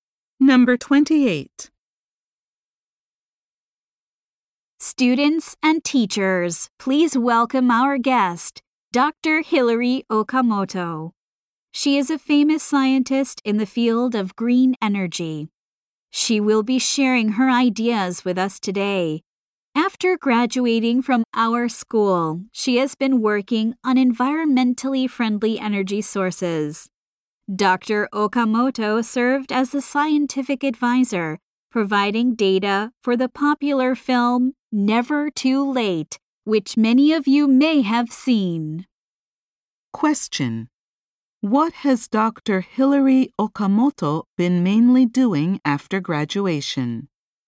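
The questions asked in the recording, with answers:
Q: What has Dr. Hilary Okamoto been mainly doing after graduation?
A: Working on environmentally friendly energy sources.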